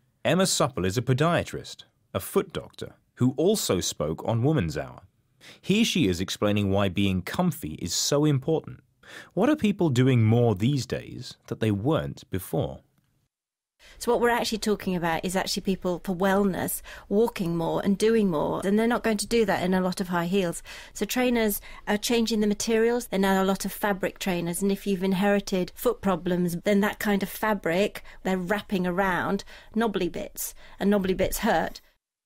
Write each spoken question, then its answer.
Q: What are people doing more these days that they weren't before?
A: They're walking more, and they're doing it for wellness.